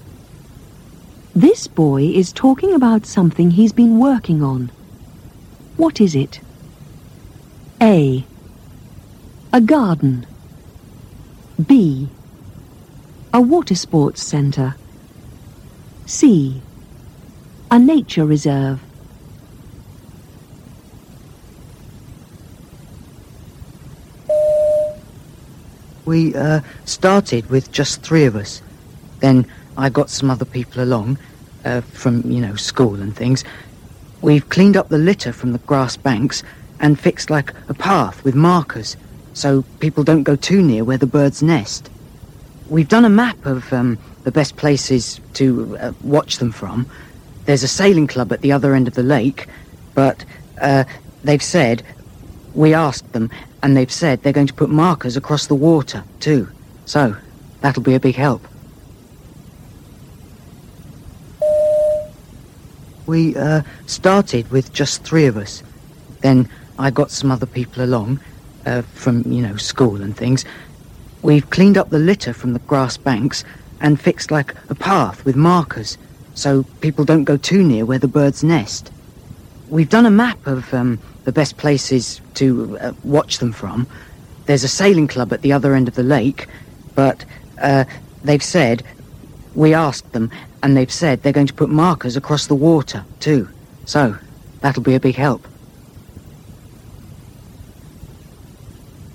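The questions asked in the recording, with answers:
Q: What is it? A. A garden. B. A water sports centre. C. A nature reserve.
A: C: A nature reserve.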